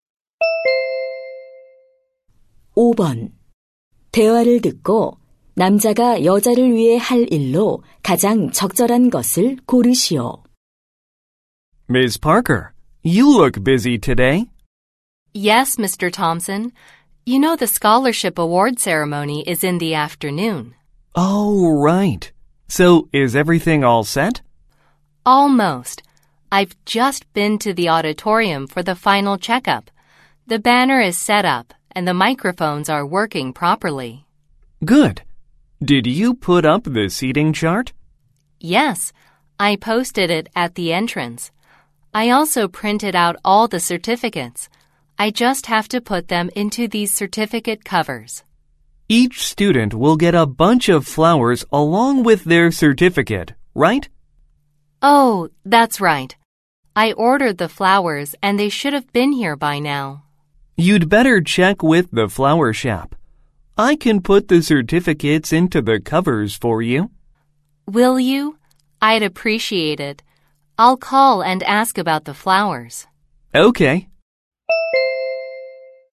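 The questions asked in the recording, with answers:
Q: 대화를 듣고 남자가 여자를 위해 할 일로 가장 적절한 것을 고르시오.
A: 수료증을 커버에 넣기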